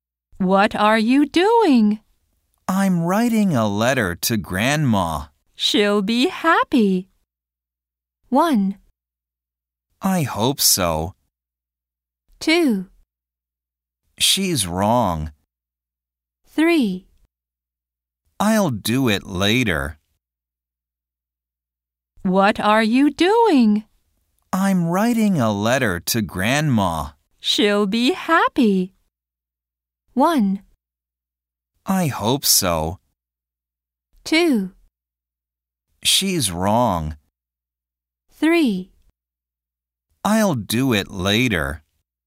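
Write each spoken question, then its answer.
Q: She'll be happy.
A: 1: I hope so.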